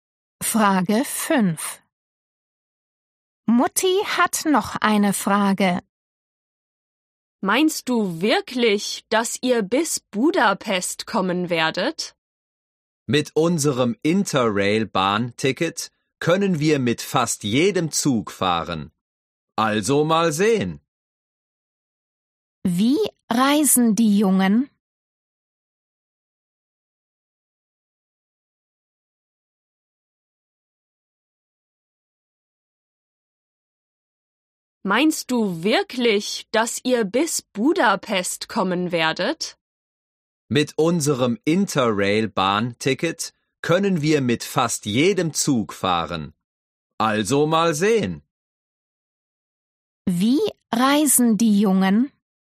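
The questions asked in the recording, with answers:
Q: Wie reisen die Jungen?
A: mit dem Zug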